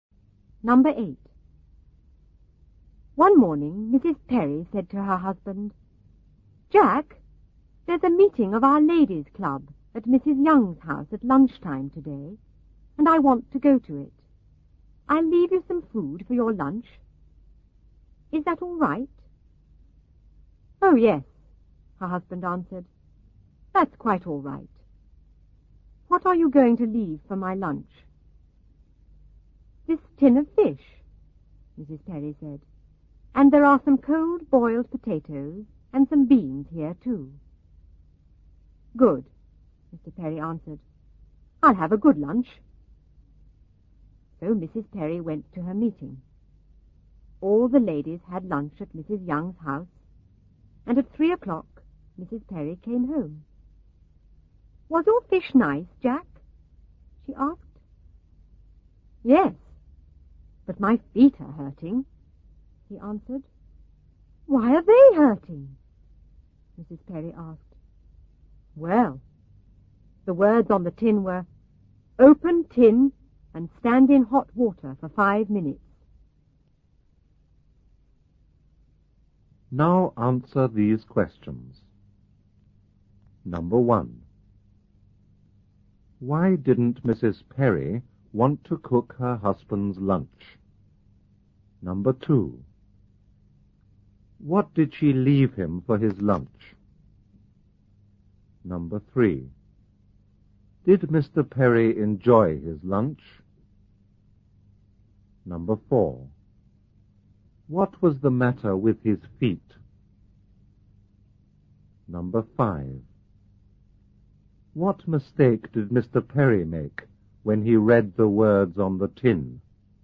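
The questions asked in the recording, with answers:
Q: Why didn't Mrs. Perry want to cook her husband's lunch?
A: She was going to a ladies' club meeting at Mrs. Young's house at lunchtime

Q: What did she leave him for his lunch?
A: A tin of fish, cold boiled potatoes and beans

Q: Did Mr. Perry enjoy his lunch?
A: Yes, the fish was nice

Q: What was the matter with his feet?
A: They were hurting because he stood in hot water

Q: What mistake did Mr. Perry make when he read the words on the tin?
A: He thought he had to stand in hot water himself, not put the tin in it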